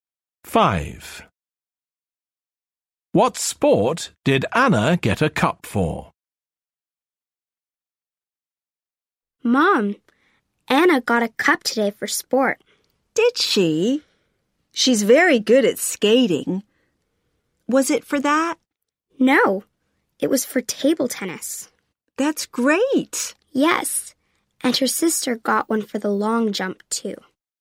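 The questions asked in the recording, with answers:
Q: What sport did Anna get a cup for?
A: Table tennis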